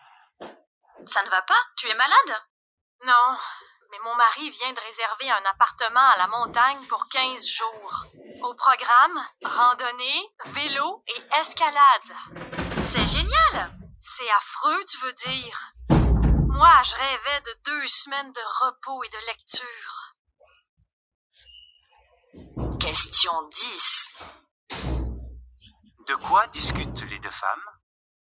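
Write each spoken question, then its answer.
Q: De quoi discutent les deux femmes?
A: De leurs vacances : le mari a réservé un appartement à la montagne pour 15 jours de sport, alors qu'elle voulait se reposer.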